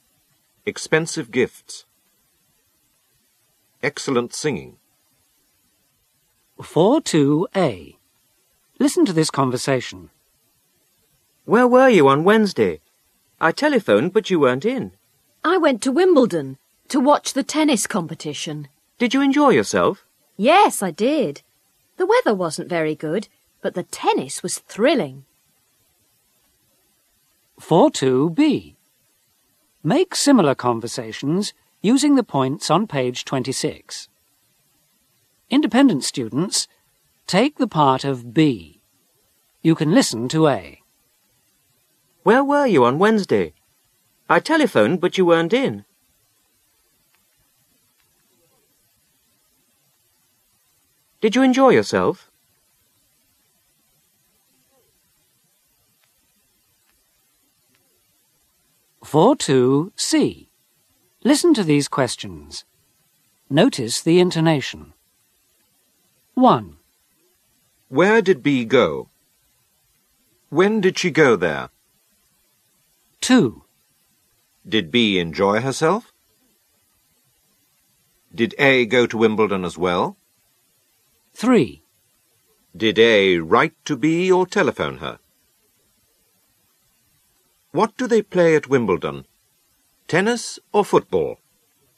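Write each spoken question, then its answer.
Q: Where did B go?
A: To Wimbledon

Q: When did she go there?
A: On Wednesday

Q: Did B enjoy herself?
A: Yes

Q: Did A go to Wimbledon as well?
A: No

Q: Did A write to B or telephone her?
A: He telephoned her

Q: What do they play at Wimbledon? Tennis or football?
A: Tennis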